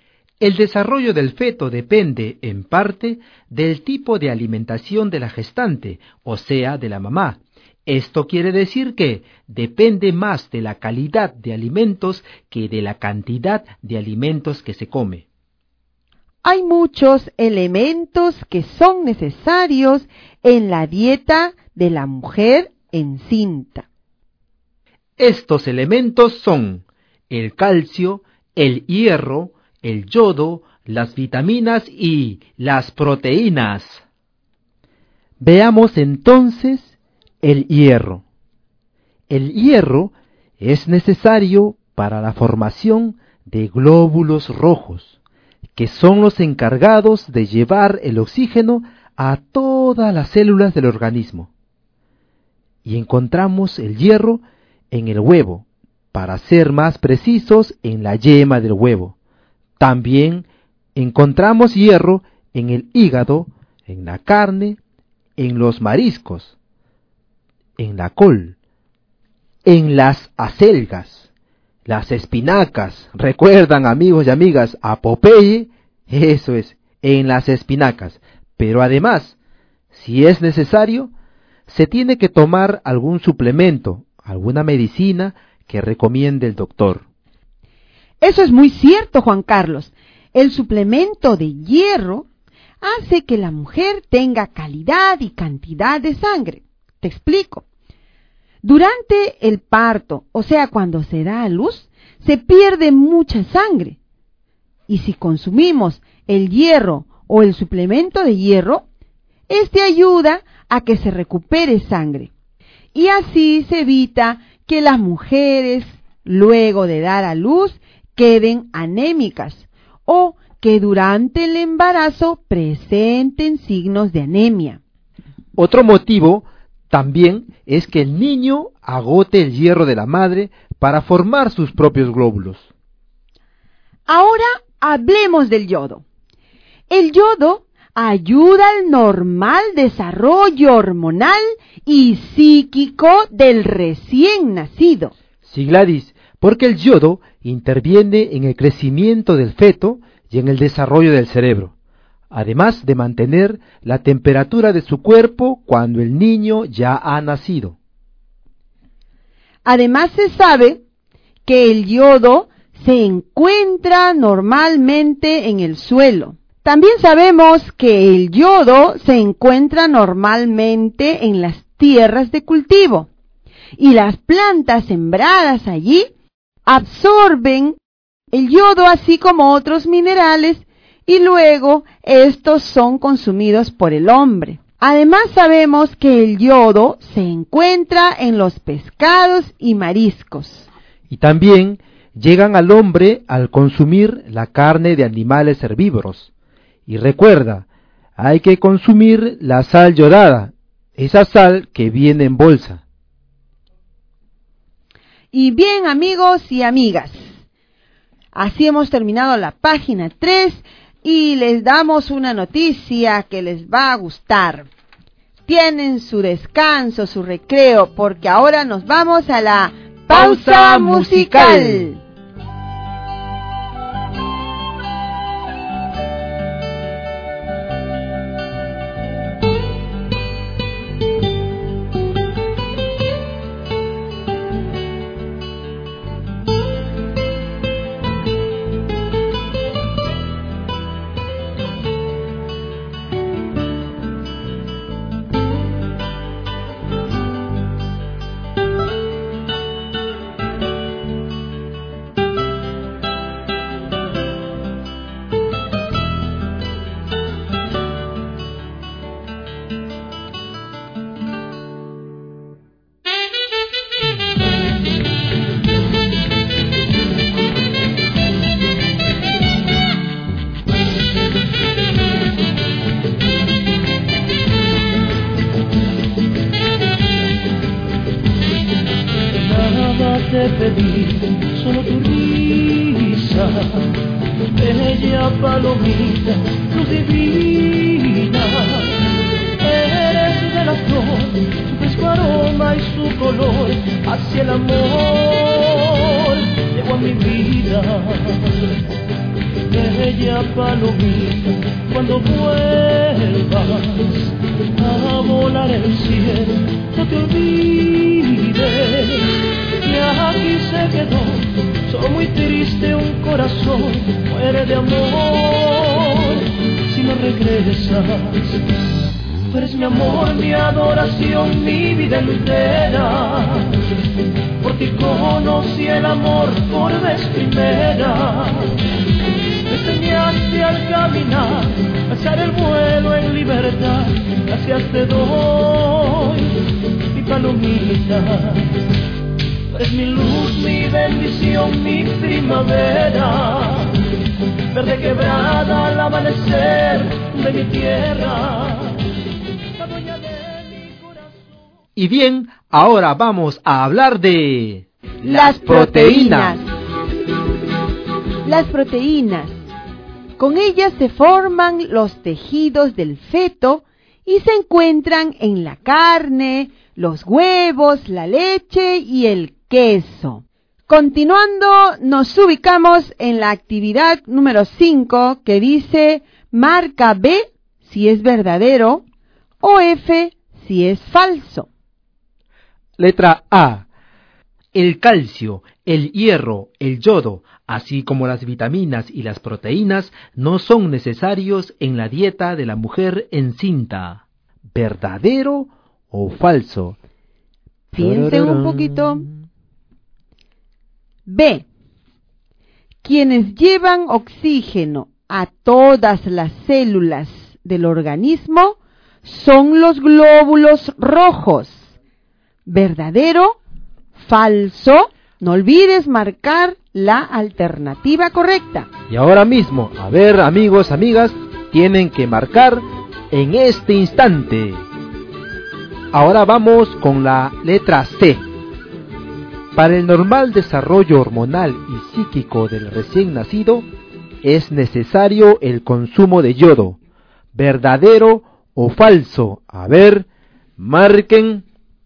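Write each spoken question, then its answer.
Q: El calcio, el hierro, el yodo, así como las vitaminas y las proteínas, no son necesarios en la dieta de la mujer encinta. ¿Verdadero o falso?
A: Falso

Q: Quienes llevan oxígeno a todas las células del organismo son los glóbulos rojos. ¿Verdadero? ¿Falso?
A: Verdadero

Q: Para el normal desarrollo hormonal y psíquico del recién nacido, es necesario el consumo de yodo. ¿Verdadero o falso?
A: Verdadero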